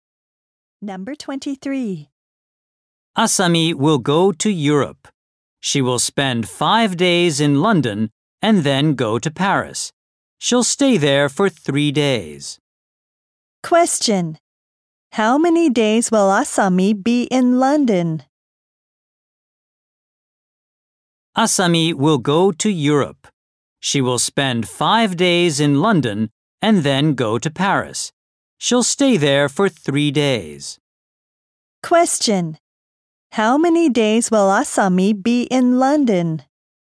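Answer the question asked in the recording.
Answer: 5 days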